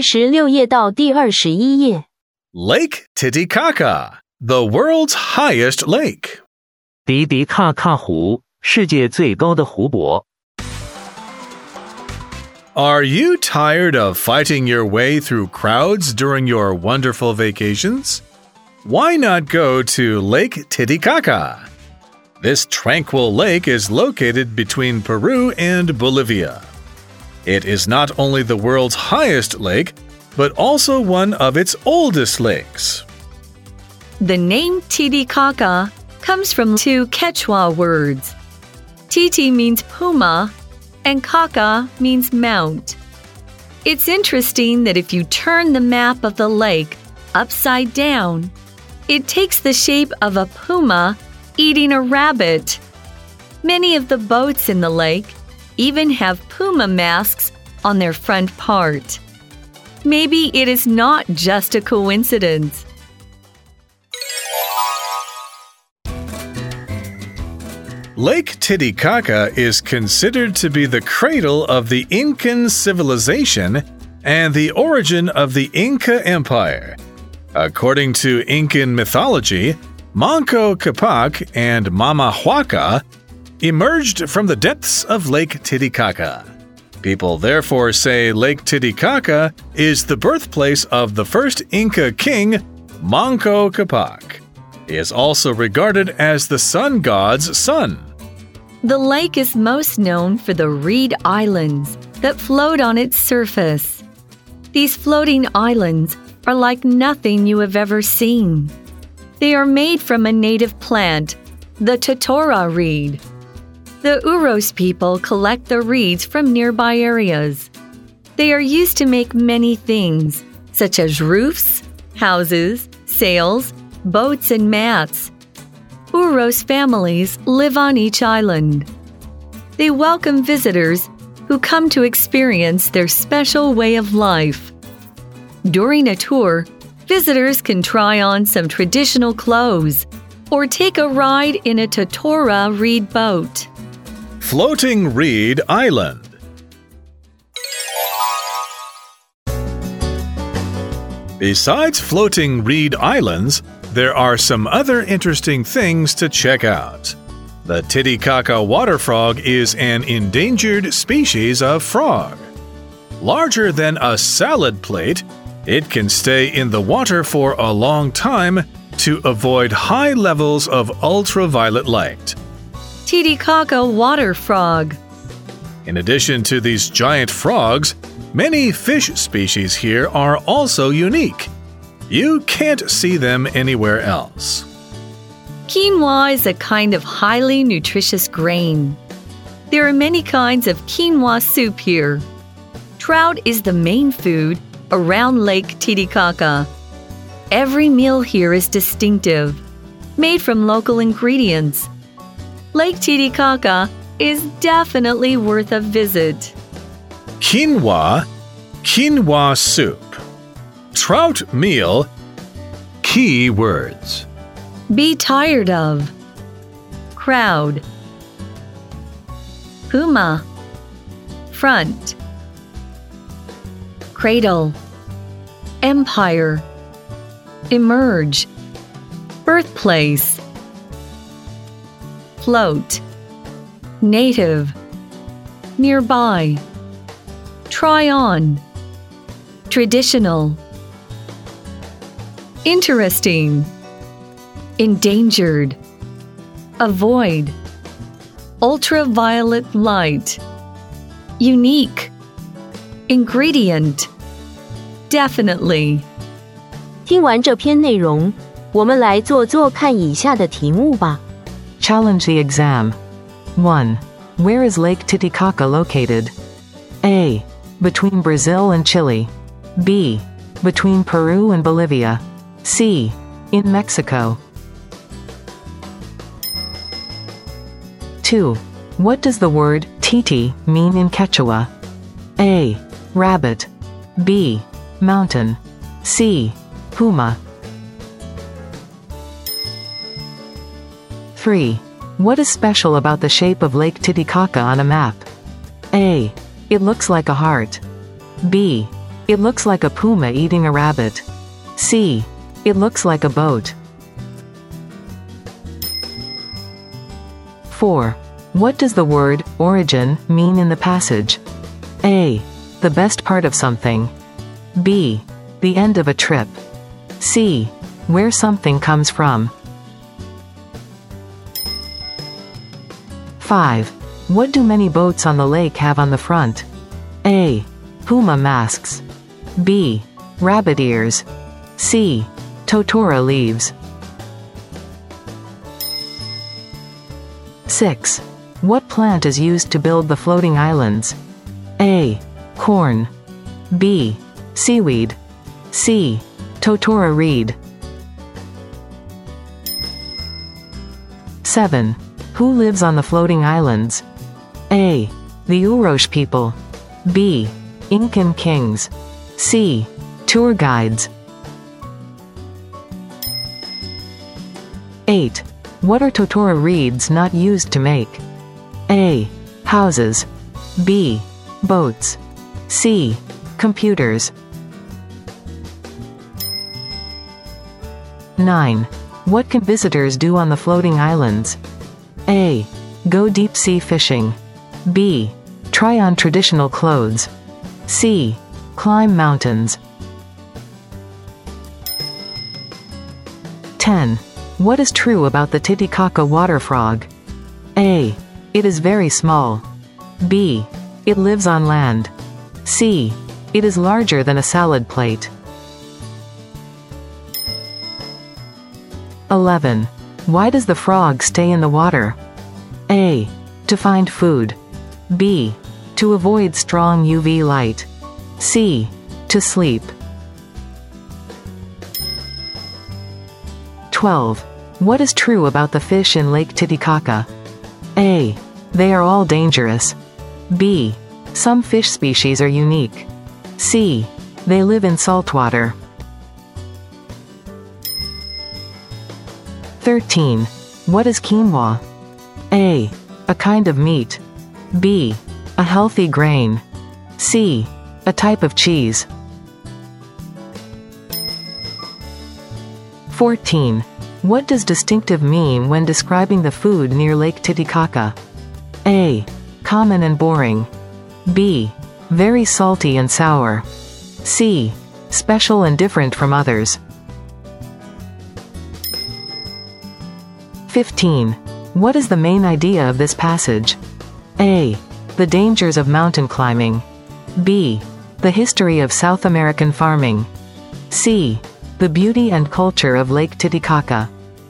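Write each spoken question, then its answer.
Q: Where is Lake Titicaca located?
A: B: Between Peru and Bolivia.

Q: What does the word titi mean in Quechua?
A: C: Puma.

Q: What is special about the shape of Lake Titicaca on a map?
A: B: It looks like a puma eating a rabbit.

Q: What does the word, origin, mean in the passage?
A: C: Where something comes from.

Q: What do many boats on the lake have on the front?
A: A: Puma masks.

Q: What plant is used to build the floating islands?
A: C: Totora reed.

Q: Who lives on the floating islands?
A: A: The Urosh people.

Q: What are Totora reeds not used to make?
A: C: Computers.

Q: What can visitors do on the floating islands?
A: B: Try on traditional clothes.

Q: What is true about the Titicaca water frog?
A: C: It is larger than a salad plate.

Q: Why does the frog stay in the water?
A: B: To avoid strong UV light.

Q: What is true about the fish in Lake Titicaca?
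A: B: Some fish species are unique.

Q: What is quinoa?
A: B: A healthy grain.

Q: What does distinctive mean when describing the food near Lake Titicaca?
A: C: Special and different from others.

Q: What is the main idea of this passage?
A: C: The beauty and culture of Lake Titicaca.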